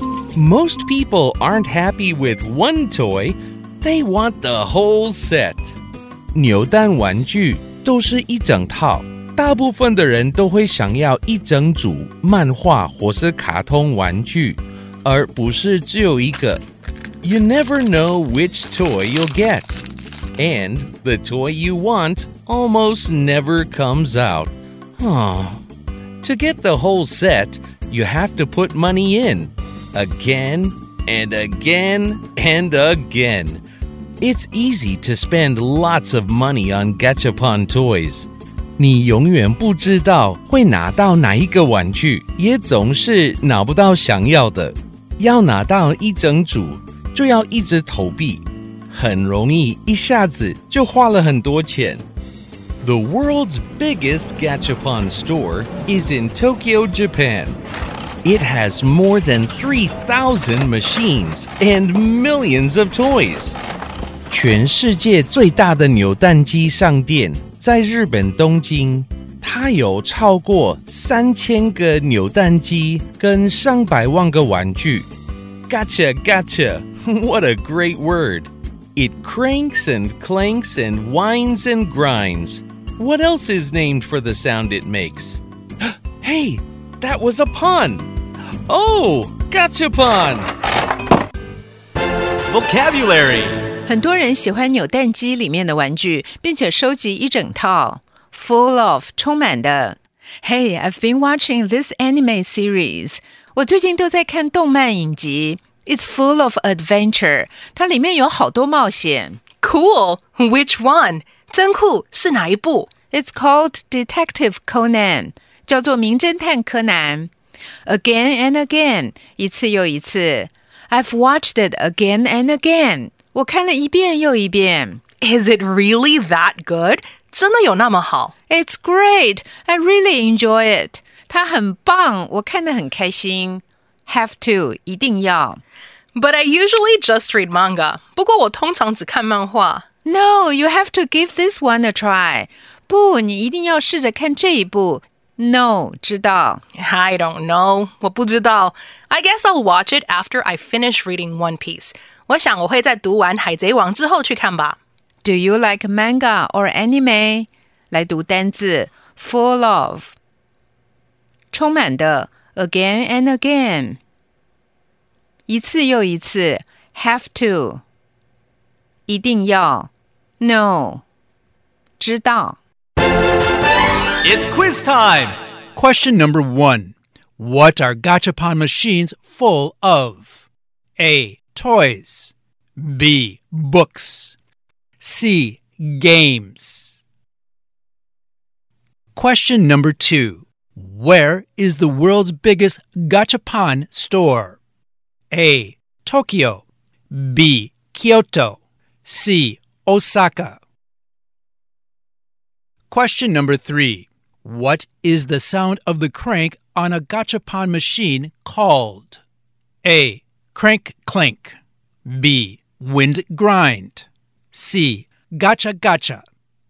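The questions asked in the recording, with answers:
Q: What are gachapon machines full of?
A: A: Toys

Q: Where is the world's biggest gachapon store?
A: A: Tokyo

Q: What is the sound of the crank on a gachapon machine called?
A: C: Gotcha, gotcha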